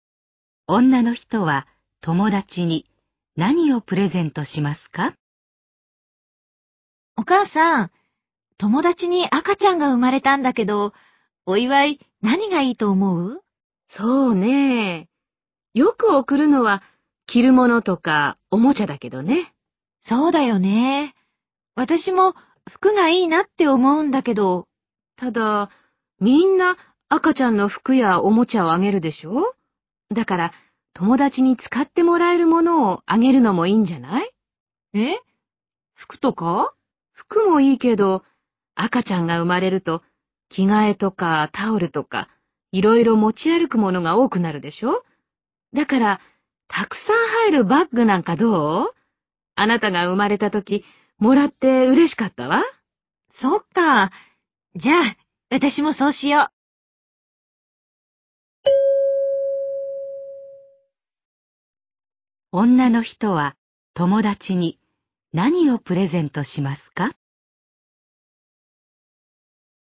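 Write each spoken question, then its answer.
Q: 女の人は友達に何をプレゼントしますか?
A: たくさん入るバッグ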